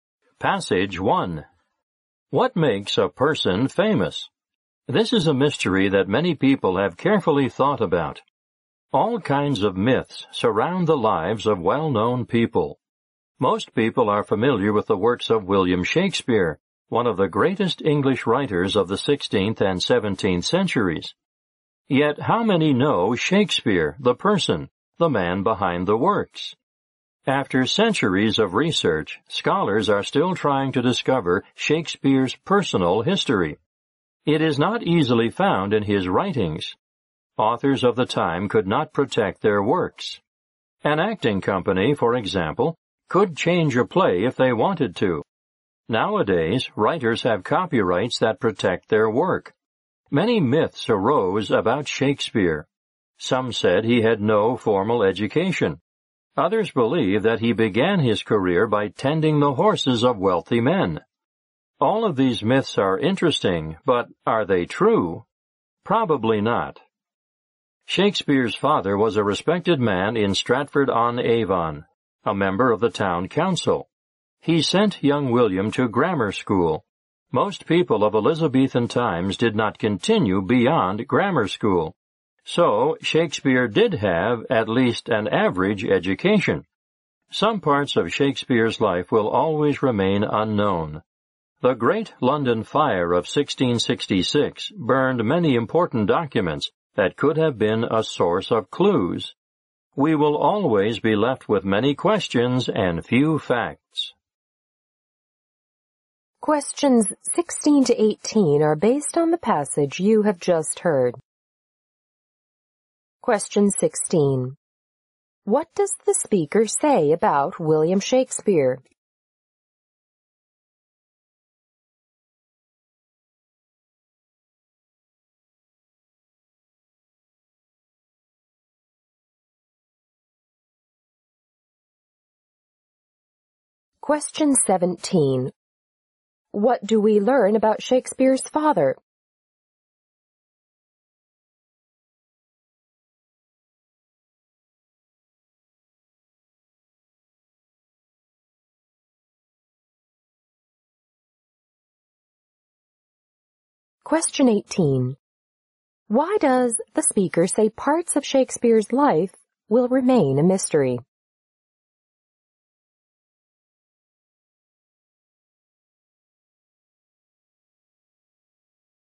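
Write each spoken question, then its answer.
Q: What does the speaker say about William Shakespeare?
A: Little is known about his personal life.

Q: What do we learn about Shakespeare's father?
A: He was a respected man and a member of the town council.

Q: Why does the speaker say parts of Shakespeare's life will remain a mystery?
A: Many important documents were burned in the Great London Fire of 1666.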